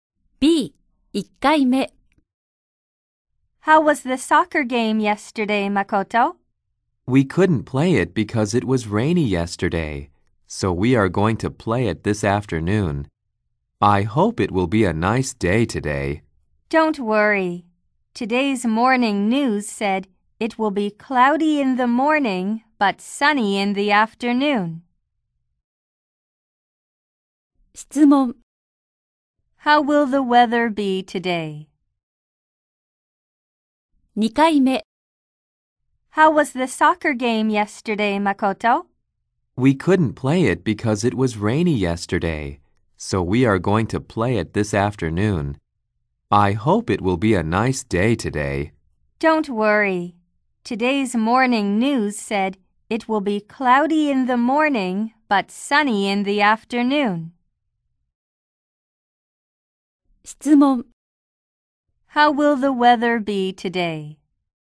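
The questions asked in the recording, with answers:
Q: How will the weather be today?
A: Cloudy in the morning but sunny in the afternoon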